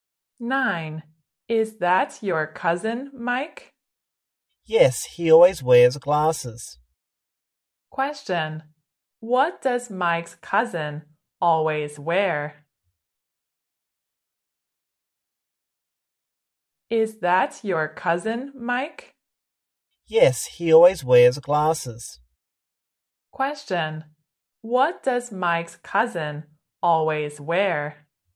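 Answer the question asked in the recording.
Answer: Glasses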